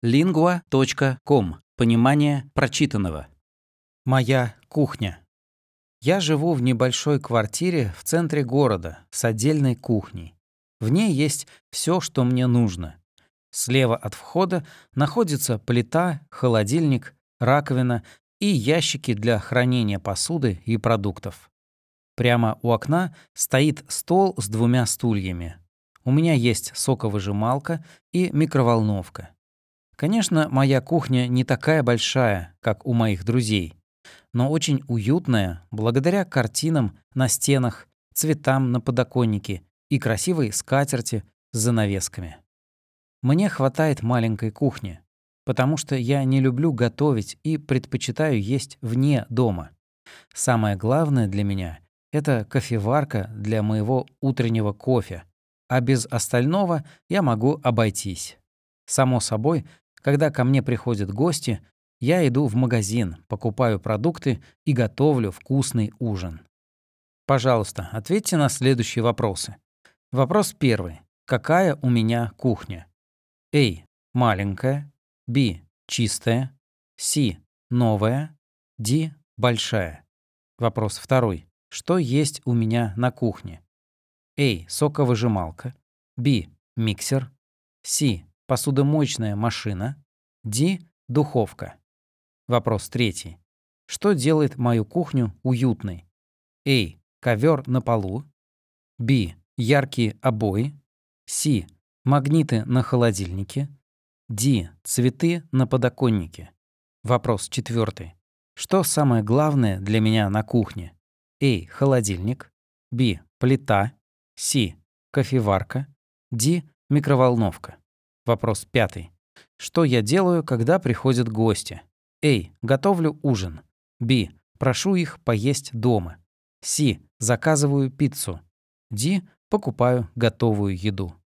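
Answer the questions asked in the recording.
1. A: Маленькая
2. A: Соковыжималка
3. D: Цветы на подоконнике
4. C: Кофеварка
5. A: Готовлю ужин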